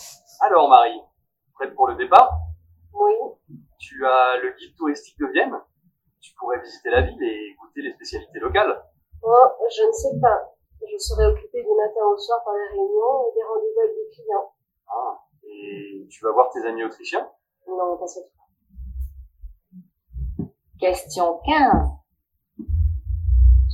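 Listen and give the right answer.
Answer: Elle va travailler (réunions et rendez-vous avec des clients)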